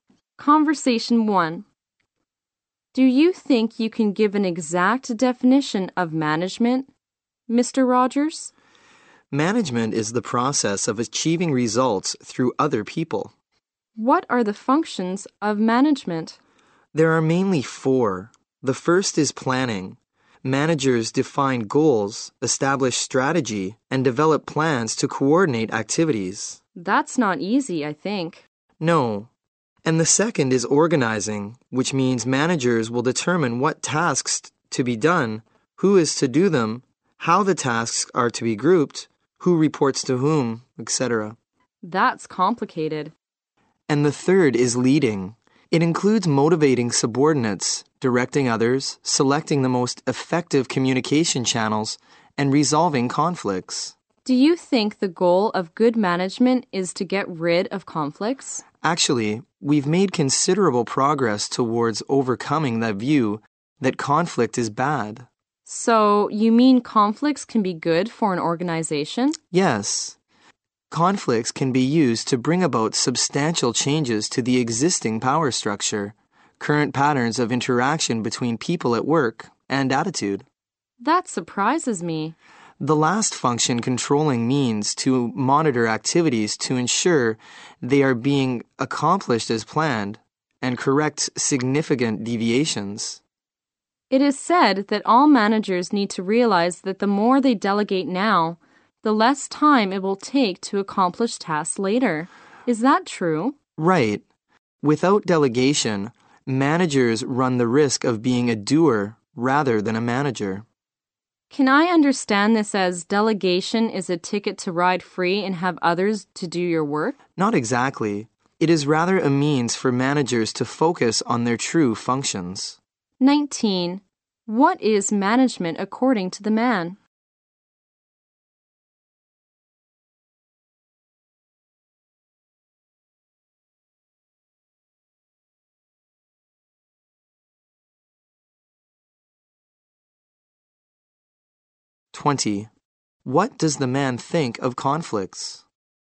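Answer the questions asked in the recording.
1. The process of achieving results through other people
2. They can be good for an organization, bringing about substantial changes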